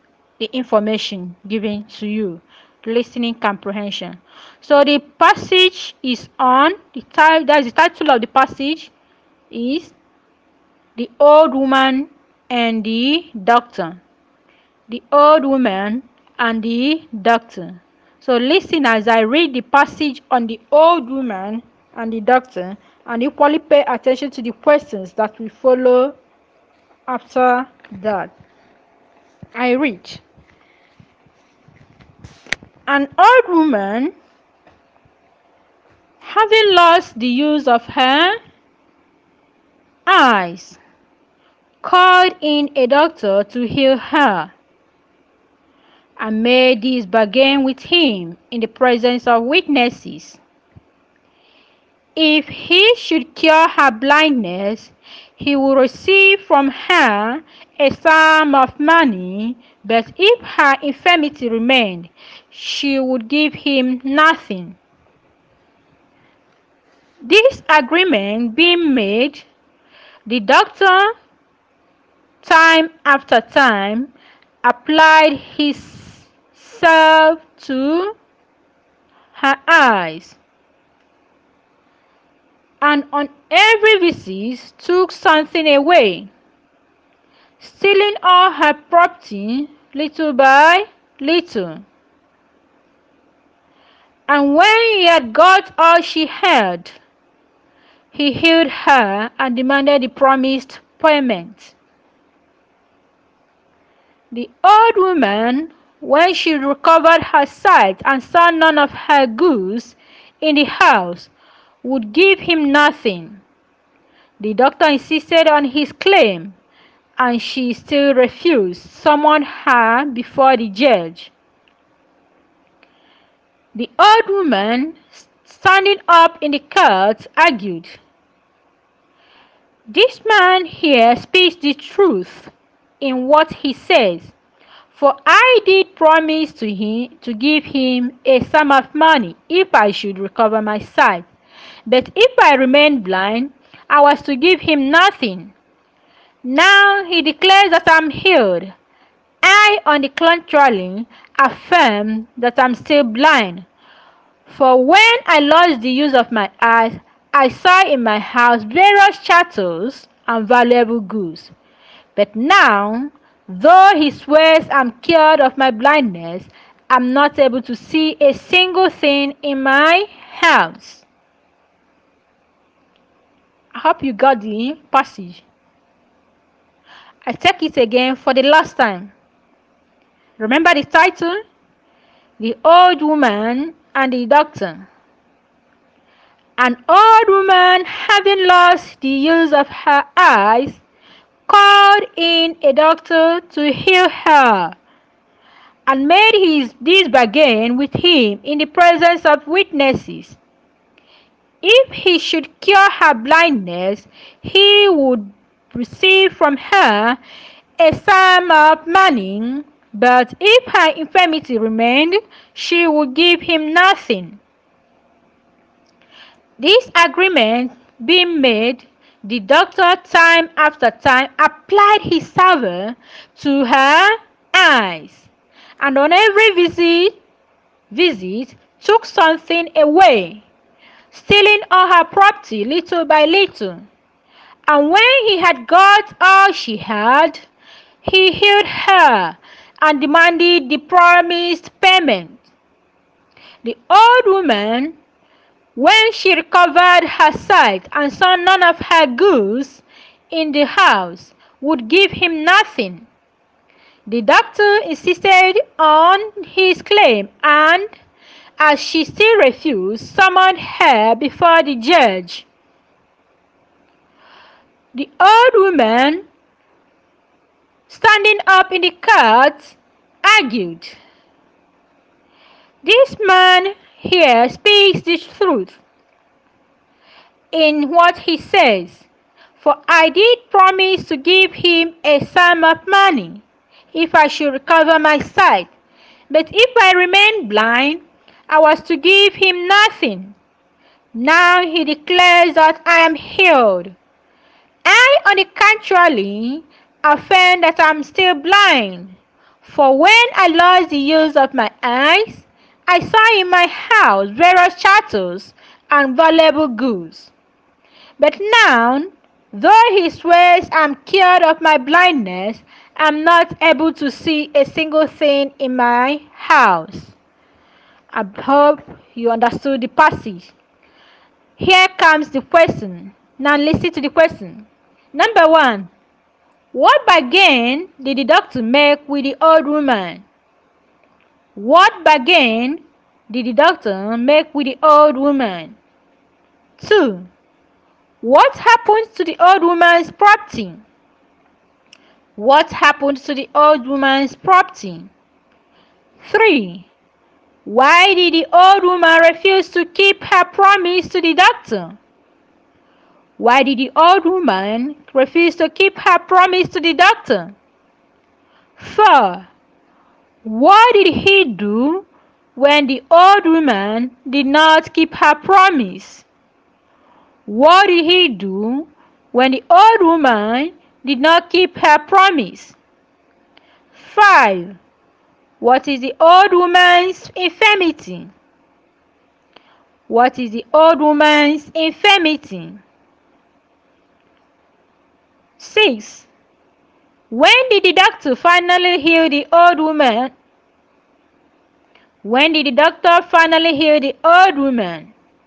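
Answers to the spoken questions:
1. If he cured her blindness she would pay him a sum of money; if not, she would give him nothing
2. The doctor stole it little by little on every visit
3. She saw none of her goods in the house, so she said she was still blind
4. He summoned her before the judge
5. Blindness
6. When he had got all she had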